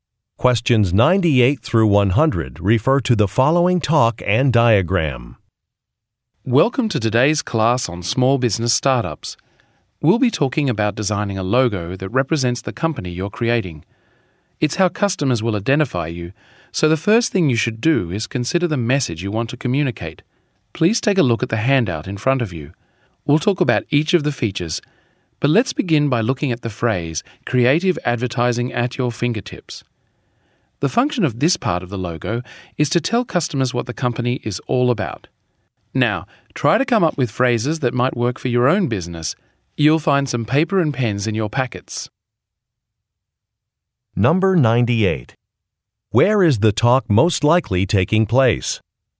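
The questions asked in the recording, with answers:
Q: Where is the talk most likely taking place?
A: At a class on small business startups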